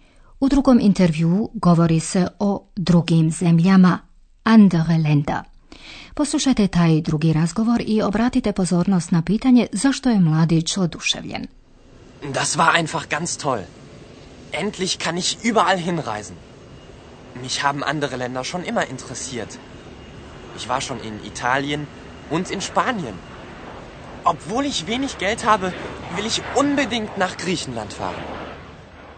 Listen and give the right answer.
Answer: Mladić je oduševljen time što konačno može posvuda putovati.